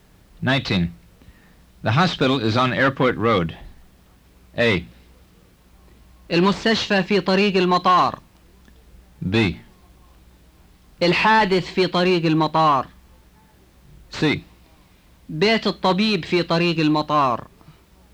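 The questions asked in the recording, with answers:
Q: The hospital is on Airport Road.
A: A: المستشفى في طريق المطار.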